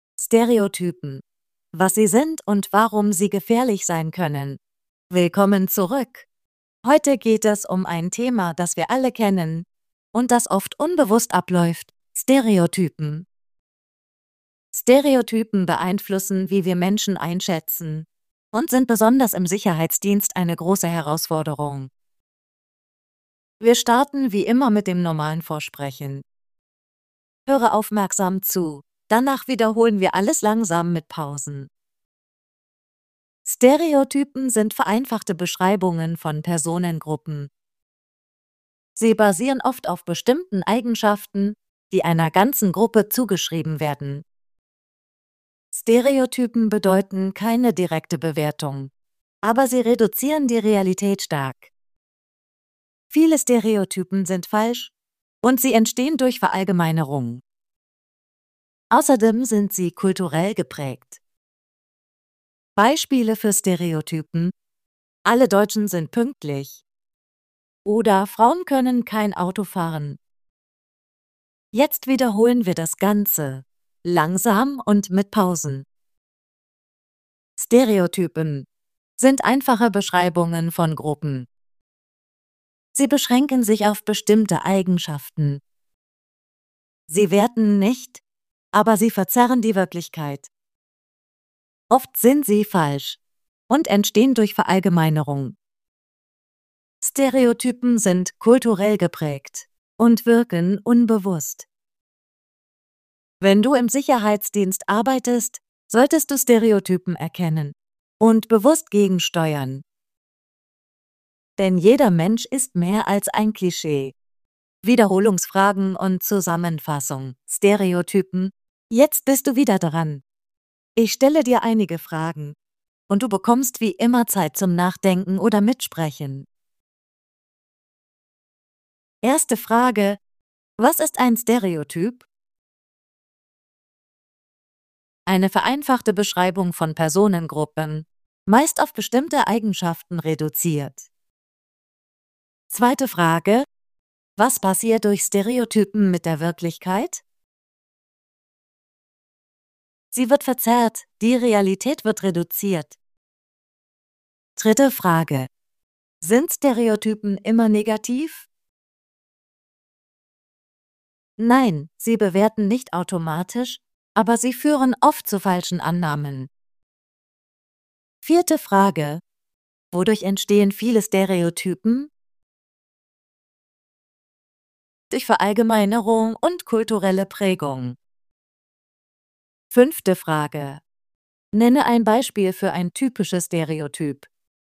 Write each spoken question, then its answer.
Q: Was ist ein Stereotyp?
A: Eine vereinfachte Beschreibung von Personengruppen, meist auf bestimmte Eigenschaften reduziert.

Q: Was passiert durch Stereotypen mit der Wirklichkeit?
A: Sie wird verzerrt, die Realität wird reduziert.

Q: Sind Stereotypen immer negativ?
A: Nein, sie bewerten nicht automatisch, aber sie führen oft zu falschen Annahmen.

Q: Nenne ein Beispiel für ein typisches Stereotyp.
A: Zum Beispiel: Alle Deutschen sind pünktlich.